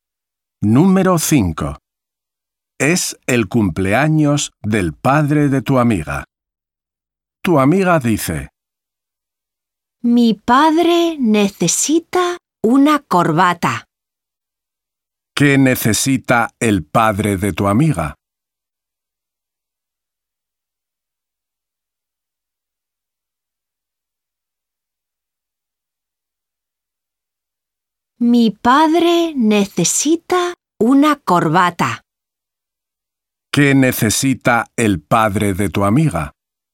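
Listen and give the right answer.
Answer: una corbata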